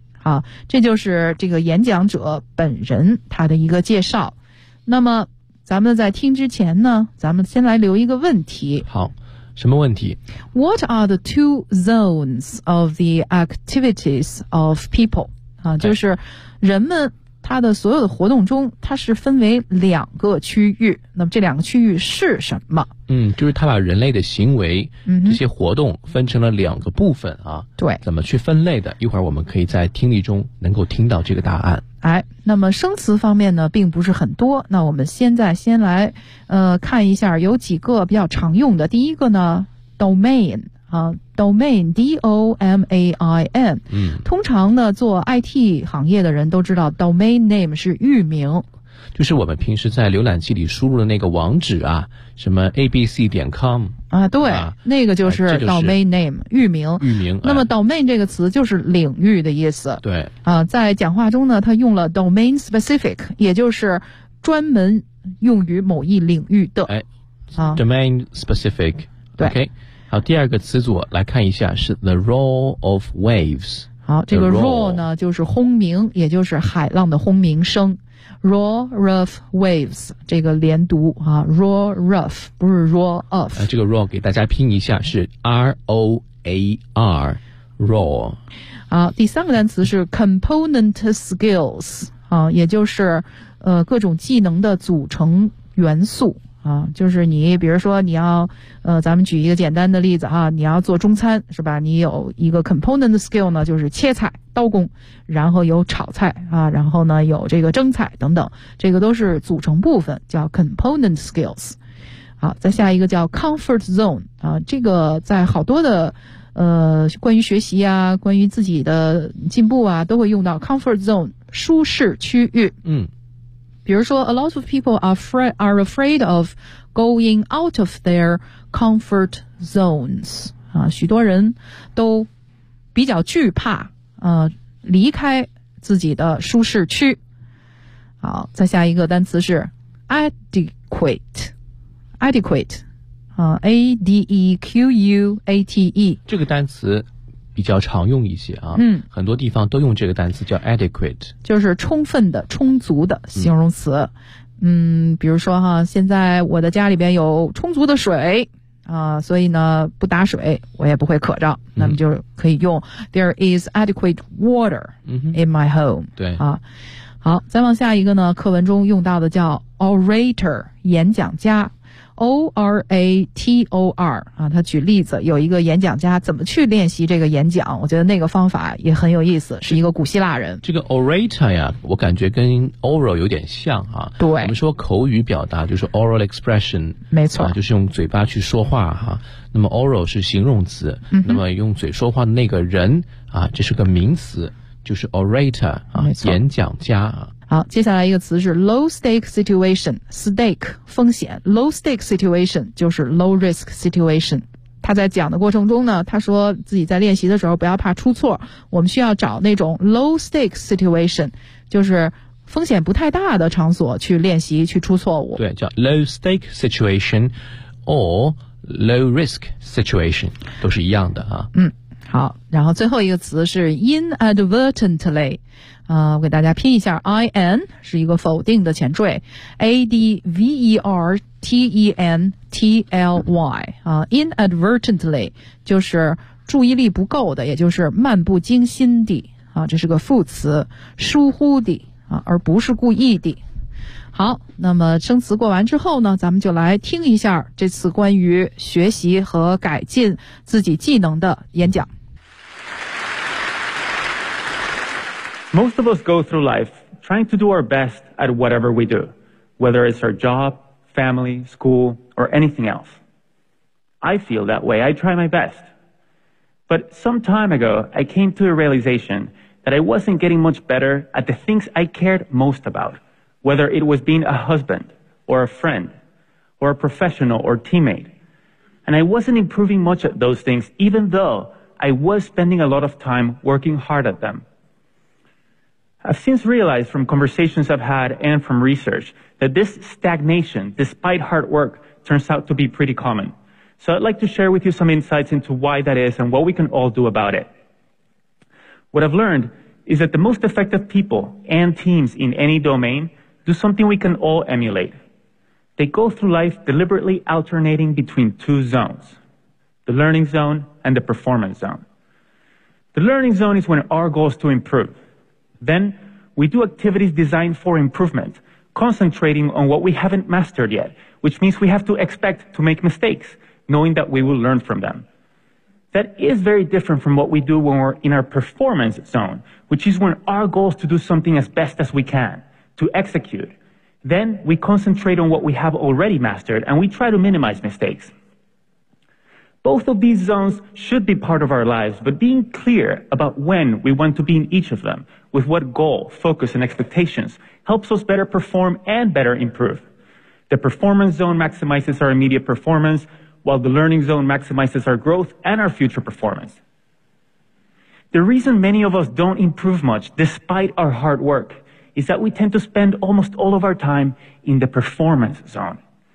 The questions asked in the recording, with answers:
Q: What are the two zones of the activities of people?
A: The learning zone and the performance zone.